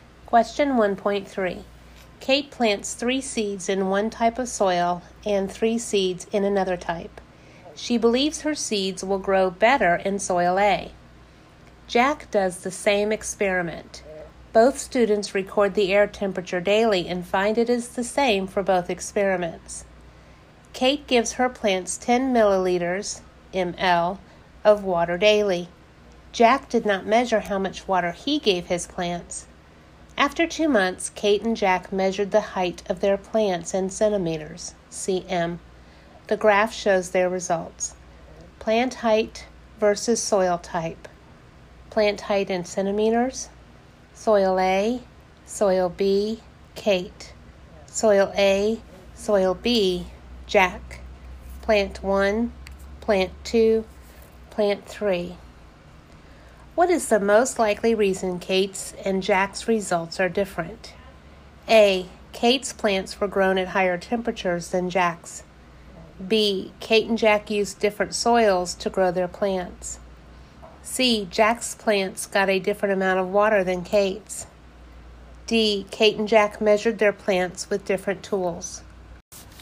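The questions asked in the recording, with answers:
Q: What is the most likely reason Kate's and Jack's results are different?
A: C: Jack's plants got a different amount of water than Kate's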